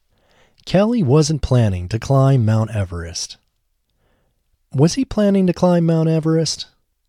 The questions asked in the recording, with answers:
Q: Was he planning to climb Mount Everest?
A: No, he wasn't planning to climb Mount Everest.